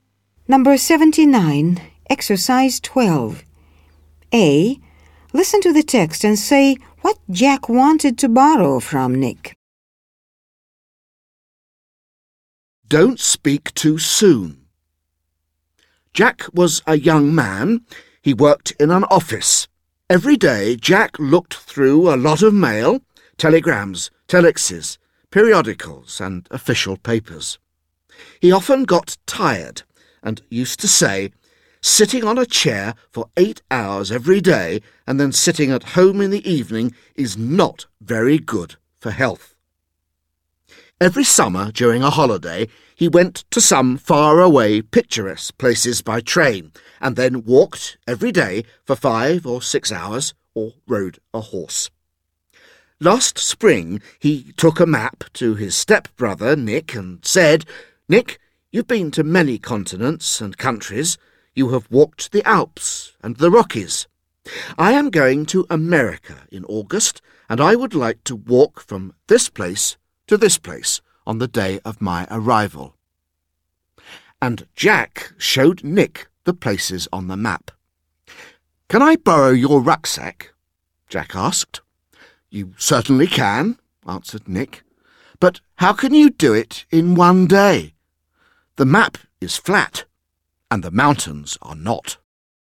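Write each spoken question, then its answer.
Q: Listen to the text and say what Jack wanted to borrow from Nick.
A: His rucksack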